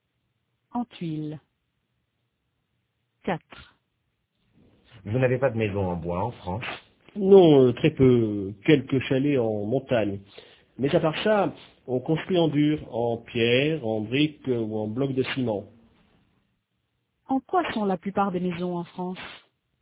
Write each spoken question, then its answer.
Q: En quoi sont la plupart des maisons en France ?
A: En dur, en pierre, en briques ou en blocs de ciment.